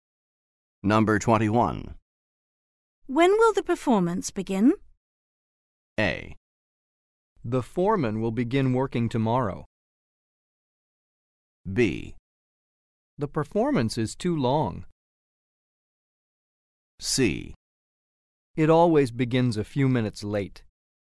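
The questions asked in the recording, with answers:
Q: When will the performance begin?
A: C: It always begins a few minutes late.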